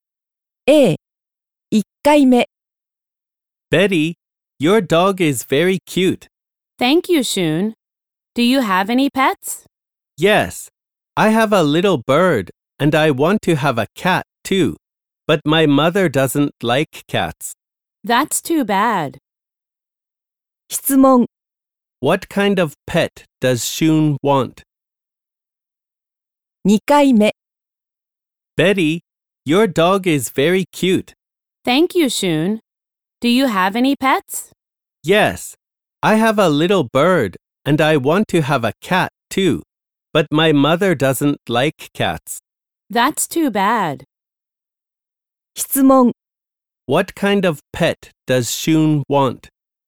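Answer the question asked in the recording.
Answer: A cat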